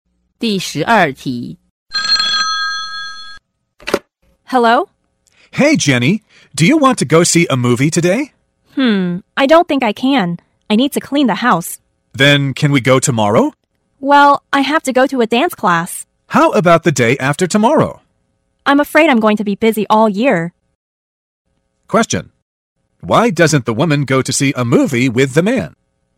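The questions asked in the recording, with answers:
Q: Why doesn't the woman go to see a movie with the man?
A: She doesn't want to go with him; she's making excuses.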